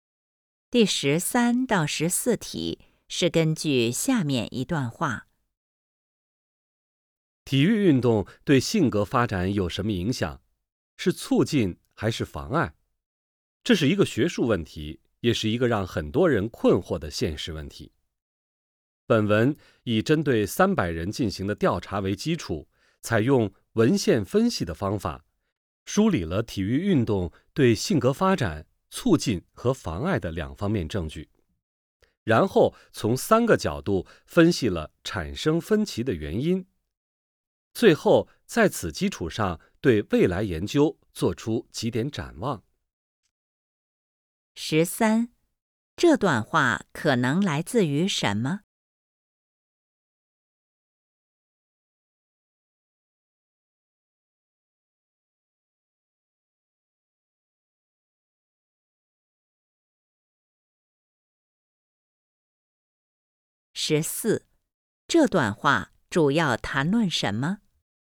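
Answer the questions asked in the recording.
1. 一篇论文(的摘要)
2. 体育运动对性格发展的影响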